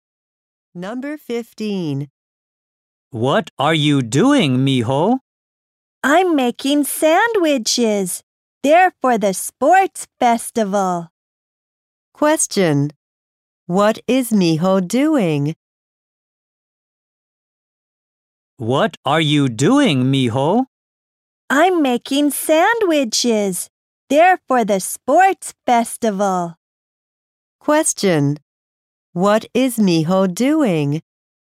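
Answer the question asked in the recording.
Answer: Making sandwiches.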